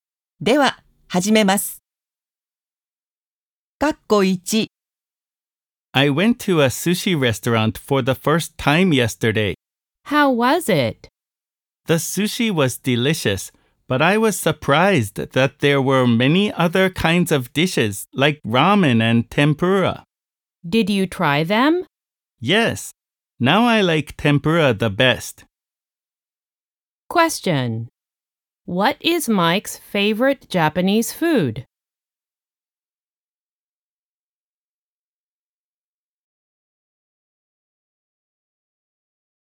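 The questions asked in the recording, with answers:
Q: Question.What is Mike's favorite Japanese food?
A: Tempura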